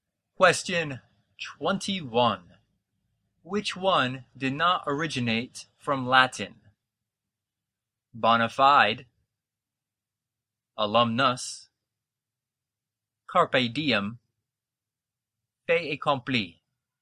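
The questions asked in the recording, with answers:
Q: Which one did not originate from Latin?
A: D: fait accompli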